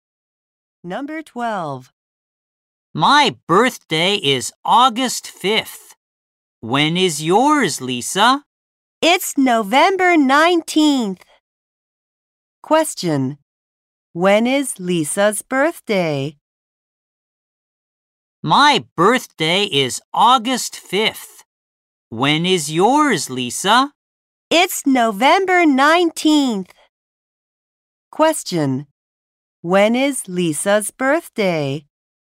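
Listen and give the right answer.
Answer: November 19th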